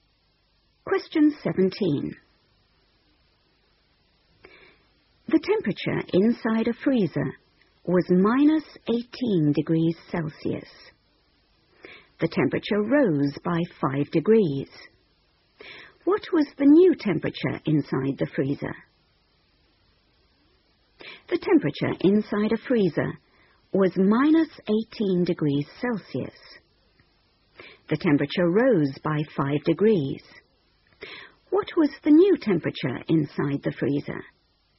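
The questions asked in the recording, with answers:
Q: What was the new temperature inside the freezer?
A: -13°C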